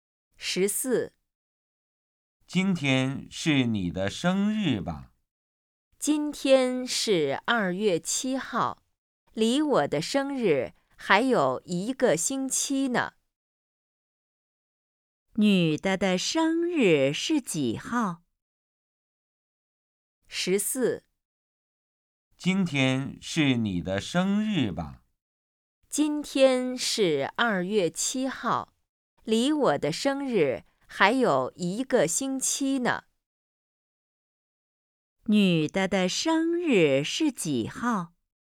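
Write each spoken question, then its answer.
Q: 女的的生日是几号?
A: 2月14号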